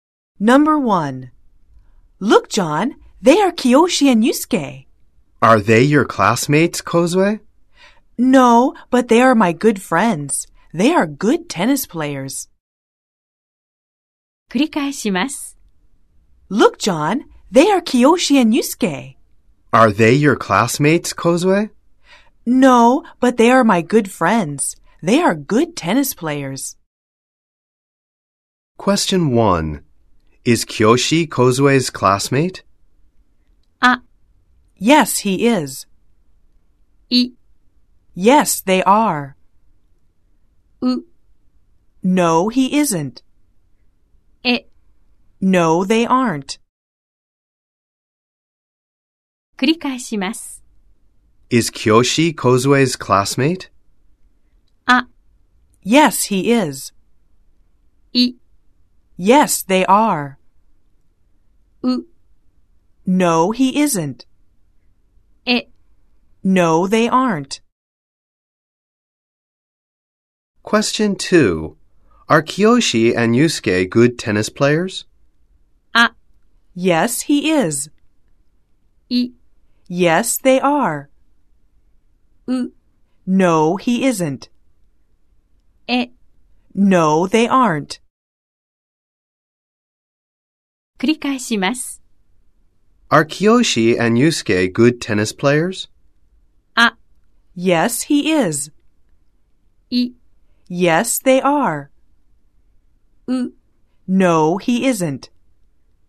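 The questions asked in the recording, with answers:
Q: Is Kiyoshi Kozue's classmate?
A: う: No, he isn't.

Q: Are Kiyoshi and Yusuke good tennis players?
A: い: Yes, they are.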